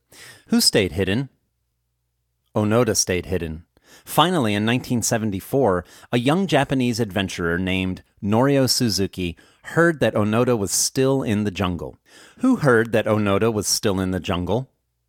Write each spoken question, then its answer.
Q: Who heard that Onoda was still in the jungle?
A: A young Japanese adventurer heard that Onoda was still in the jungle.